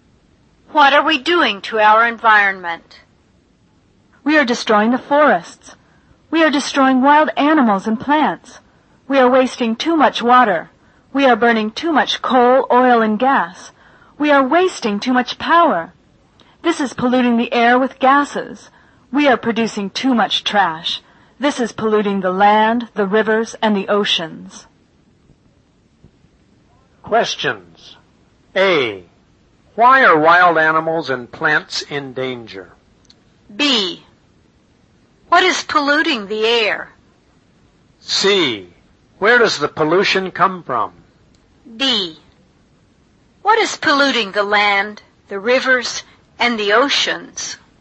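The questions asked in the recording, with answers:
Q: What is polluting the air?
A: Gases from burning too much coal, oil and gas and wasting power

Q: What is polluting the land, the rivers, and the oceans?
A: Too much trash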